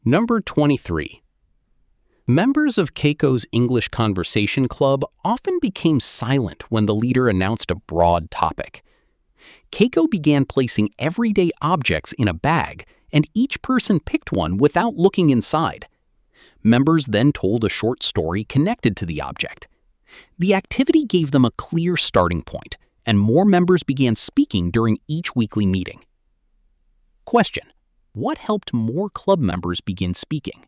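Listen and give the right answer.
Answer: Picking an everyday object from a bag and telling a short story connected to it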